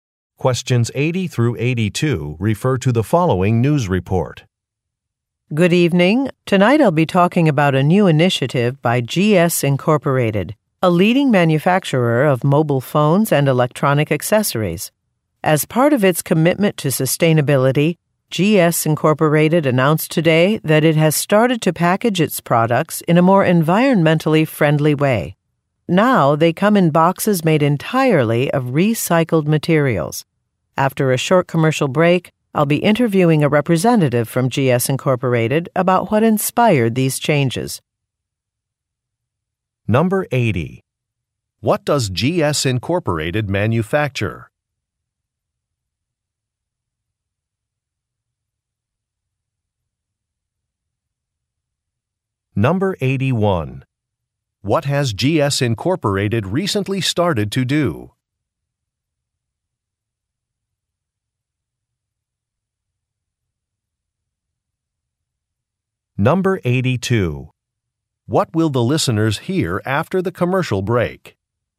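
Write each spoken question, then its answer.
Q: What does GS Incorporated manufacture?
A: Mobile phones and electronic accessories

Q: What has GS Incorporated recently started to do?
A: Package products in boxes made of recycled materials

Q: What will the listeners hear after the commercial break?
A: An interview with a GS Incorporated representative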